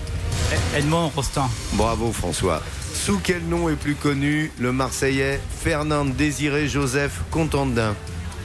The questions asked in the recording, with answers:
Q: Sous quel nom est plus connu le Marseillais Fernand Désiré Joseph Contandin?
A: Fernandel.